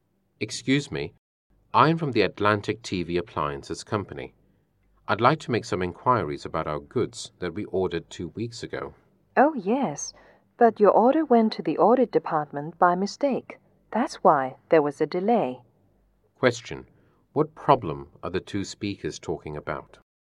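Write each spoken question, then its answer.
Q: What problem are the two speakers talking about?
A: The delay of their order, which went to the audit department by mistake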